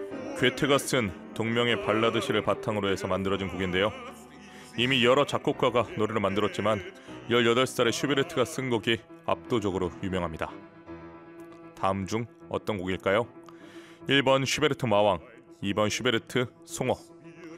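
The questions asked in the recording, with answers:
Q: 다음 중 어떤 곡일까요? 1번 슈베르트 마왕, 2번 슈베르트 송어.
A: 1: 슈베르트 마왕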